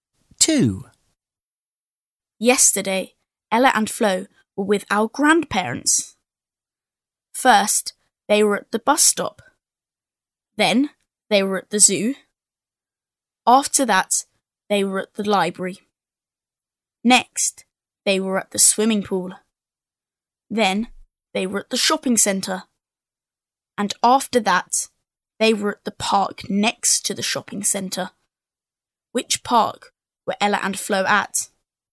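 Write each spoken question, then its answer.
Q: Which park were Ella and Flo at?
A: the park next to the shopping centre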